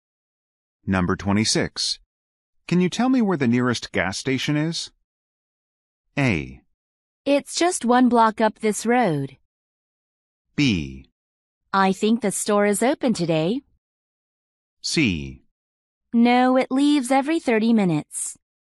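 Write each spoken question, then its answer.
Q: Can you tell me where the nearest gas station is?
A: A: It's just one block up this road.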